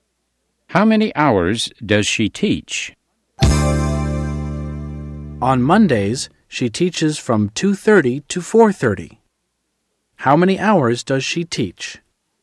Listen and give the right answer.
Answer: She teaches for 2 hours.